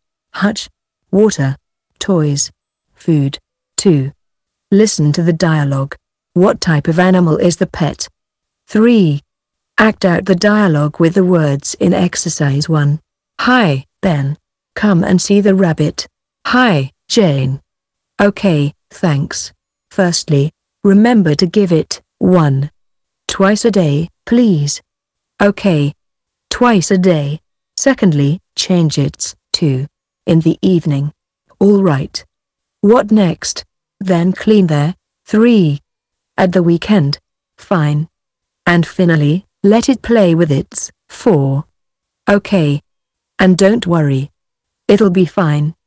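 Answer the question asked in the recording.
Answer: a rabbit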